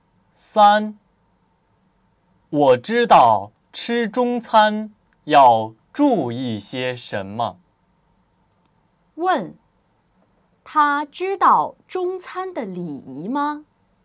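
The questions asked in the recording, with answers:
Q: 问,他知道中餐的礼仪吗?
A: 知道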